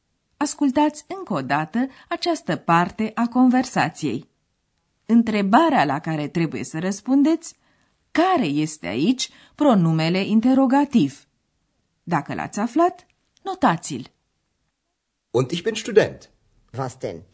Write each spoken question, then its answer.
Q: Întrebarea la care trebuie să răspundeți care este aici pronumele interrogativ.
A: Căutam apoi pronumele interogativ was.